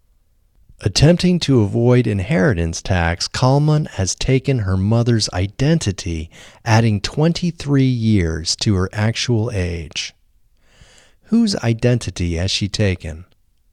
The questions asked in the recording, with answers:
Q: Whose identity has she taken?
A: She has taken her mother's identity.